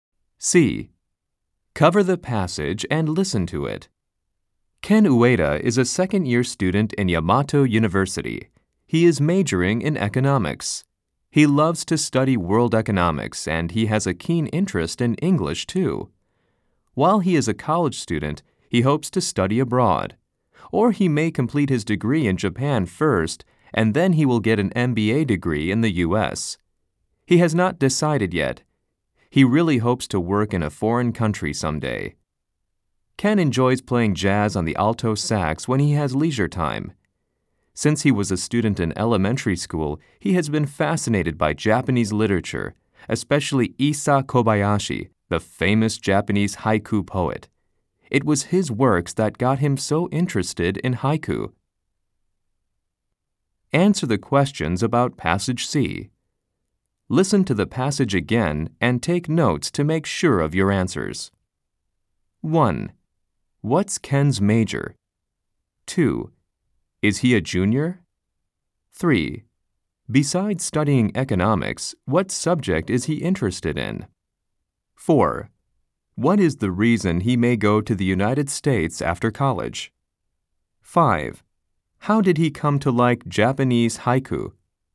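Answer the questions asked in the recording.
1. Economics
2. No, he is a second-year student (sophomore).
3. English
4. To get an MBA degree
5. Through the works of Issa Kobayashi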